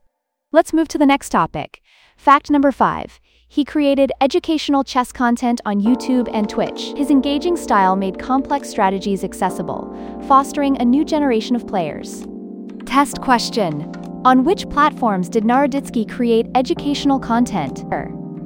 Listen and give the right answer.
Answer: YouTube and Twitch.